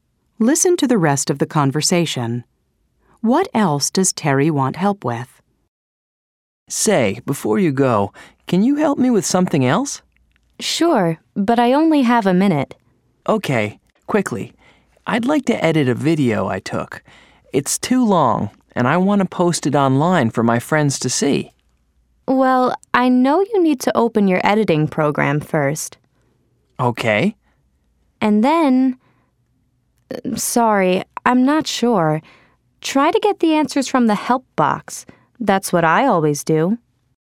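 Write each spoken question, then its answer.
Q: What else does Terry want help with?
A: Editing a video he took so it is shorter to post online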